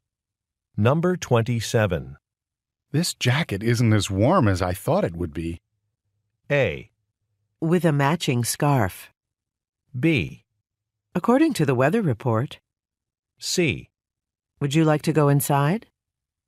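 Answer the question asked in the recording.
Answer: C: Would you like to go inside?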